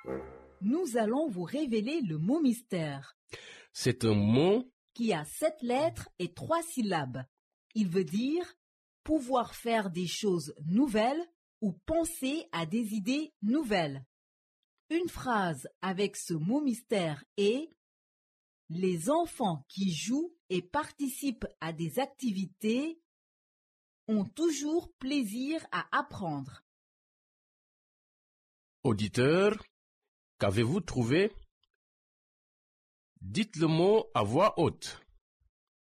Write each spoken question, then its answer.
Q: Auditeur, qu'avez-vous trouvé?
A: Le mot mystère d'aujourd'hui est créatif.